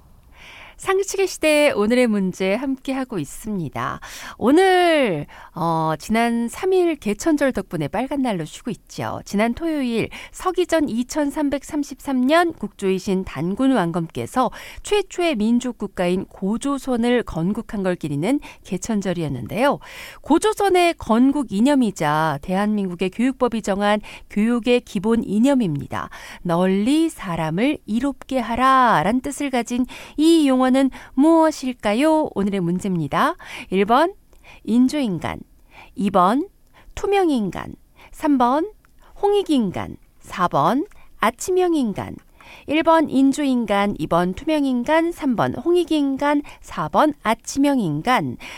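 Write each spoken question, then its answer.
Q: 널리 사람을 이롭게 하라 라는 뜻을 가진 이 용어는 무엇일까요?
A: 3번: 홍익인간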